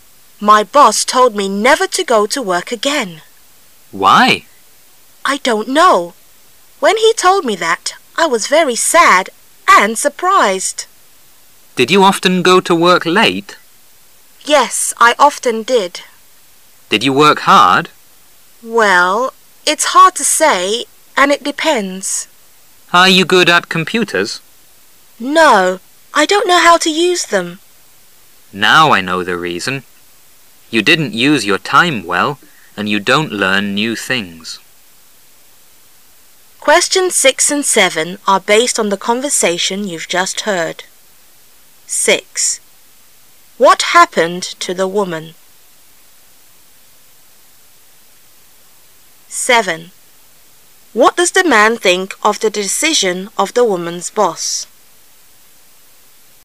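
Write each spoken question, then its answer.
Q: What happened to the woman?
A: She lost her job (her boss fired her).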